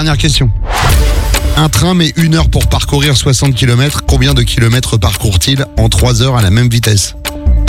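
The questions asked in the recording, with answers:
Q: Combien de kilomètres parcourt-il en 3 heures à la même vitesse?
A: 180 km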